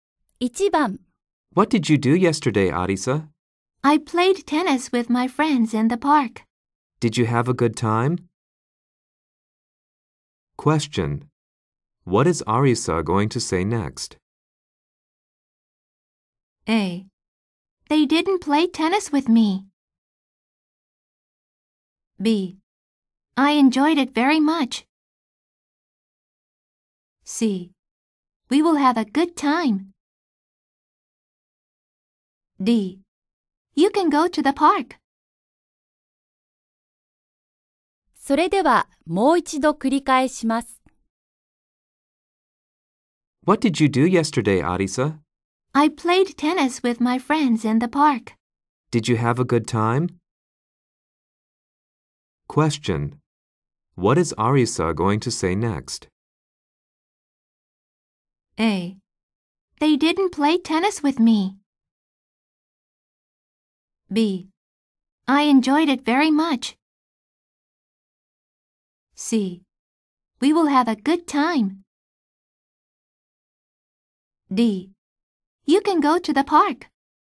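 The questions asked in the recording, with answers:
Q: What is Arisa going to say next?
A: B: I enjoyed it very much.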